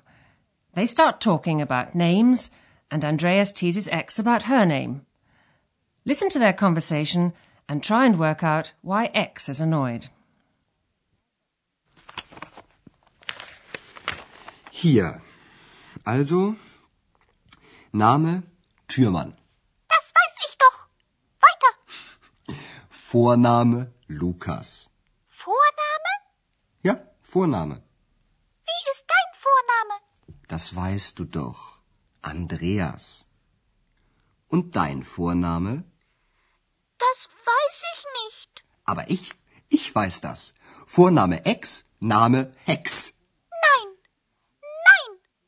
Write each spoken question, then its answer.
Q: Listen to their conversation and try and work out why X is annoyed.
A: X is annoyed because Andreas has thought up a surname for her.